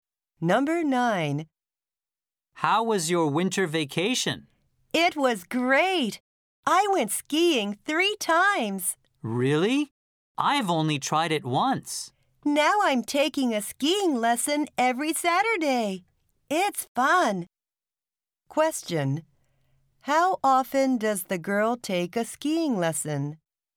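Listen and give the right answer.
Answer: Every Saturday (once a week)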